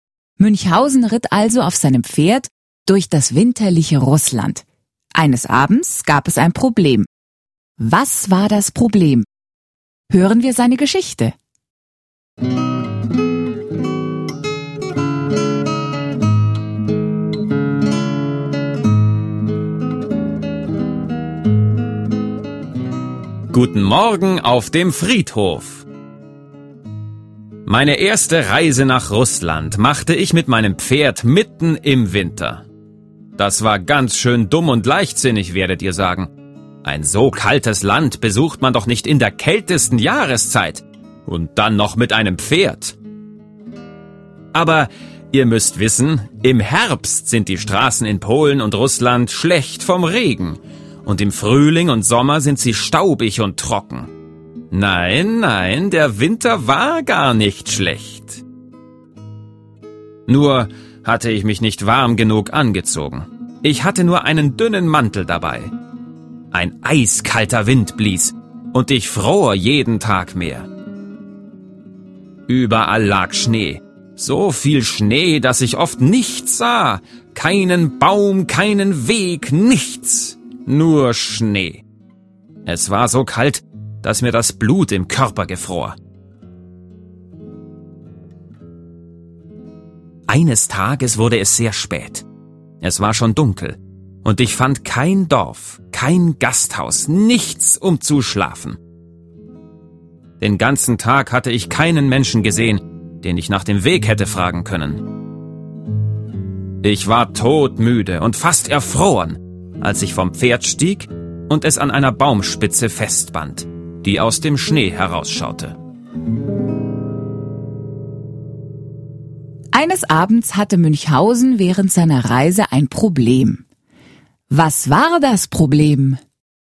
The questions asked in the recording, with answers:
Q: Was war das Problem?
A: Eines Abends fand Münchhausen nichts, um zu schlafen.